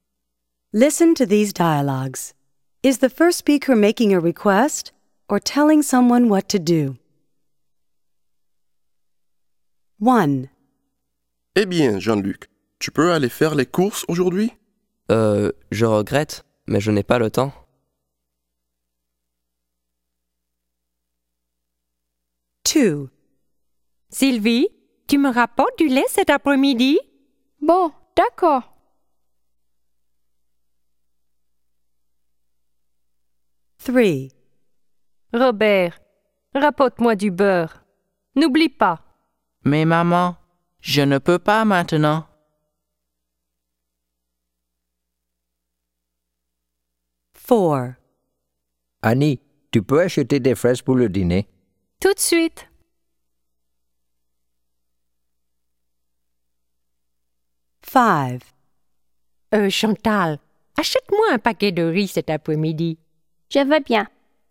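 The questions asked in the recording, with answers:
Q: Is the first speaker making a request or telling someone what to do?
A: making a request

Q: Is the first speaker making a request or telling someone what to do?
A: making a request

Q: Is the first speaker making a request or telling someone what to do?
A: telling someone what to do

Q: Is the first speaker making a request or telling someone what to do?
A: making a request

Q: Is the first speaker making a request or telling someone what to do?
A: telling someone what to do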